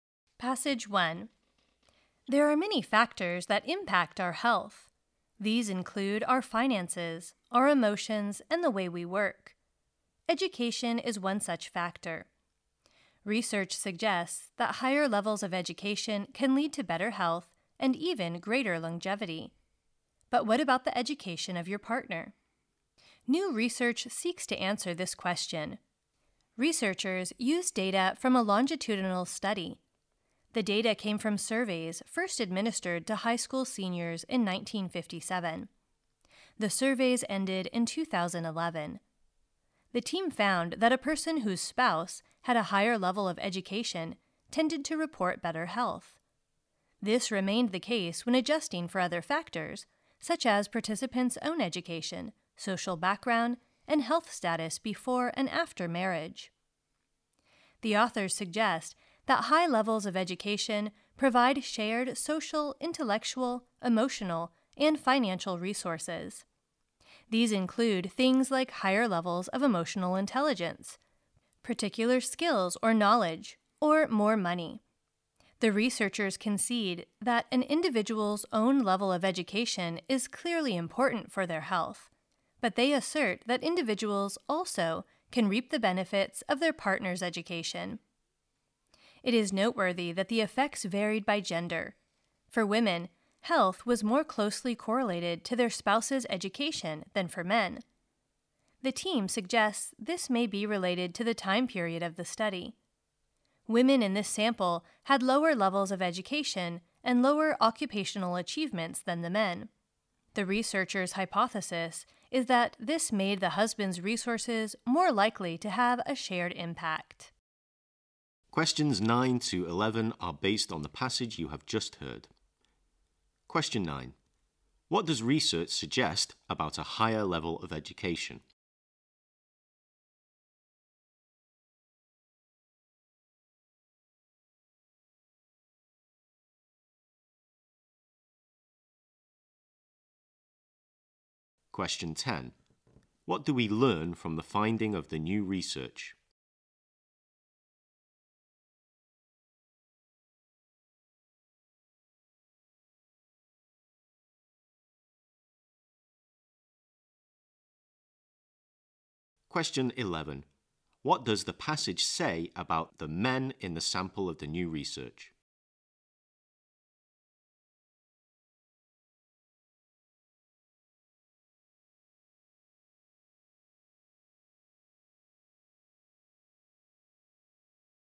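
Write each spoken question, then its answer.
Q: What does research suggest about a higher level of education?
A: It can lead to better health and greater longevity

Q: What do we learn from the finding of the new research?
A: People whose spouse had a higher level of education tended to report better health

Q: What does the passage say about the men in the sample of the new research?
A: They had higher levels of education and higher occupational achievements than the women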